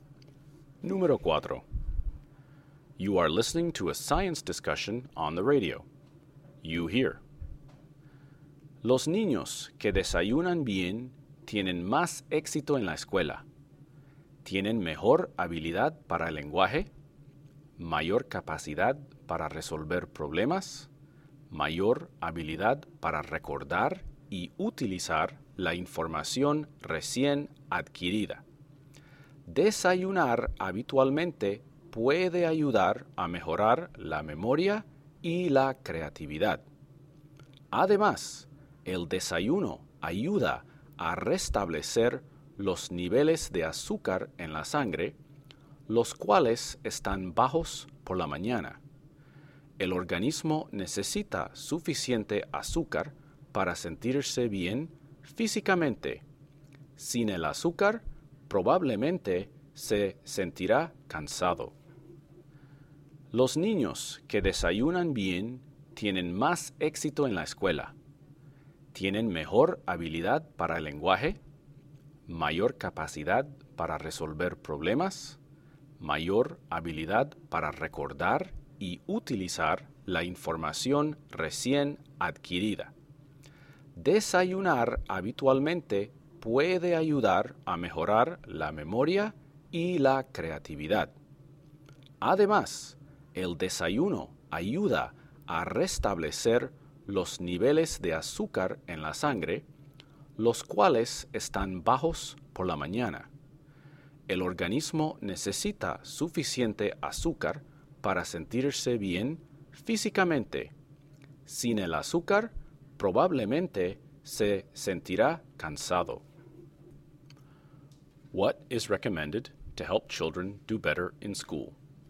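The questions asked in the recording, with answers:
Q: What is recommended to help children do better in school?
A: Eating a good breakfast regularly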